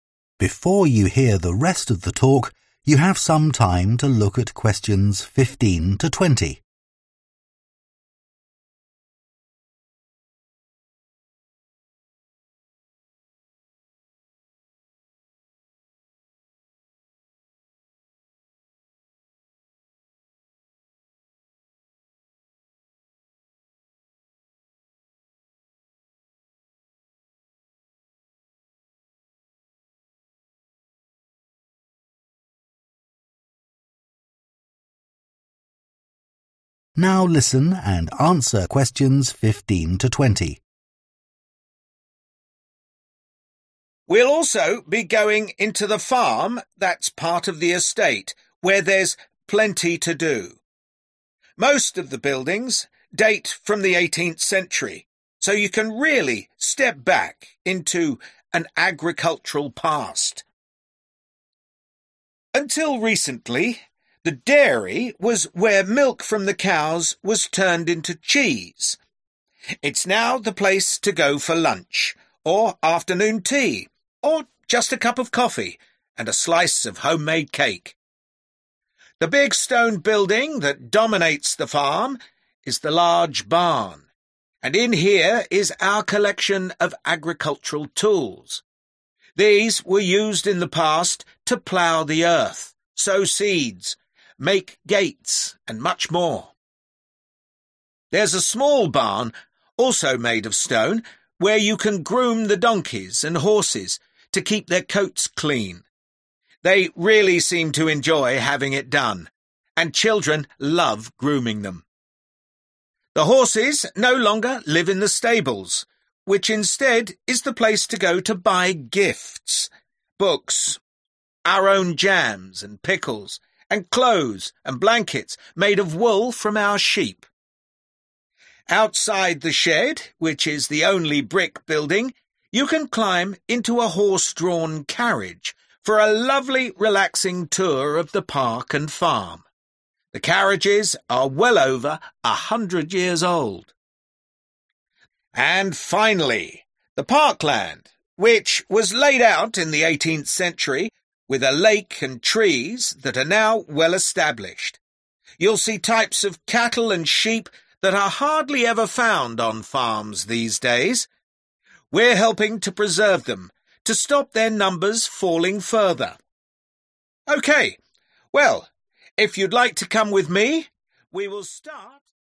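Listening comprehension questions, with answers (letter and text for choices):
Choose SIX answers from the box and write the correct letter, A-H, next to Questions 15-20.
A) shopping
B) watching cows being milked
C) seeing old farming equipment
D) eating and drinking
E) starting a trip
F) seeing rare breeds of animals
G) helping to look after animals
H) using farming tools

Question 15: dairy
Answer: D) eating and drinking

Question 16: large barn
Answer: C) seeing old farming equipment

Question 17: small barn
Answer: G) helping to look after animals

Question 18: stables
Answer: A) shopping

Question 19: shed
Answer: E) starting a trip

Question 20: parkland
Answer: F) seeing rare breeds of animals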